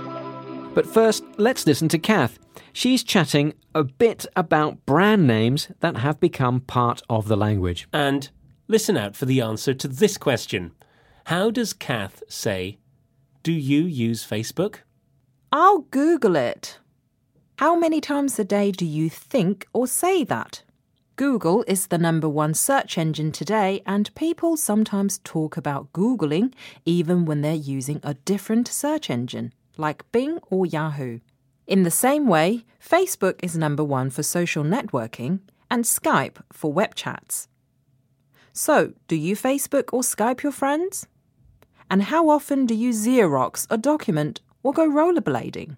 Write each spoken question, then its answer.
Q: How does Kath say, do you use Facebook?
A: she said, do you Facebook your friends?